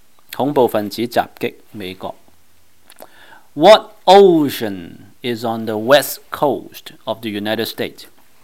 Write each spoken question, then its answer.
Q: What ocean is on the west coast of the United States?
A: 答案是 Pacific Ocean, 太平洋。